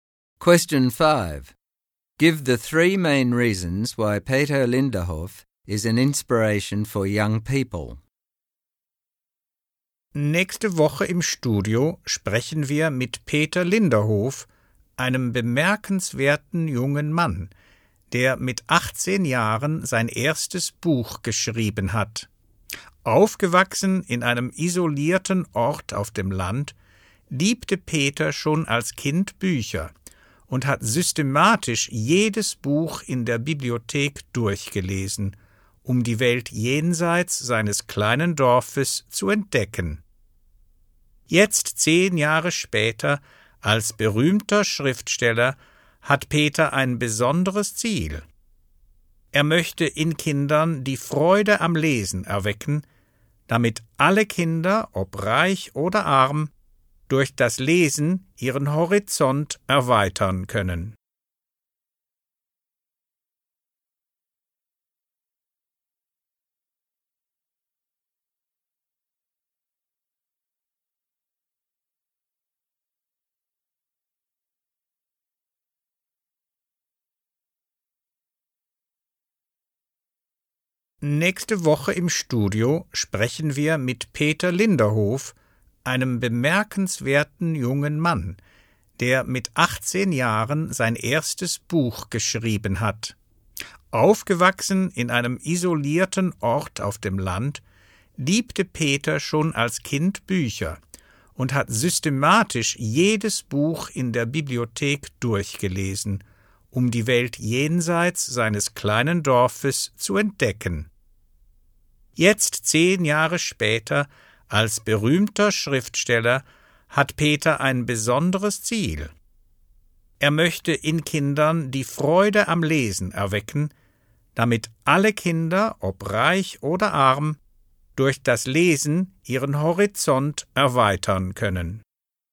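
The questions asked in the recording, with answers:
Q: Give the three main reasons why Peter Linderhof is an inspiration for young people.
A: He wrote his first book at 18. He grew up in an isolated place and discovered the world by reading every book in the library. Now a famous writer, he wants to give all children, rich or poor, a love of reading.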